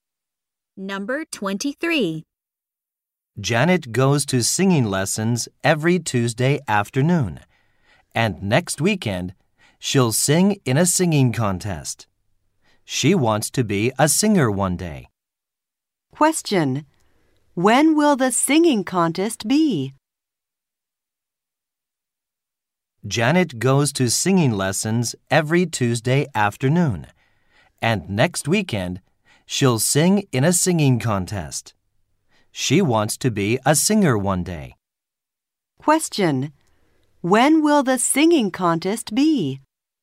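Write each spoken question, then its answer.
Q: Question. When will the singing contest be?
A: Next weekend.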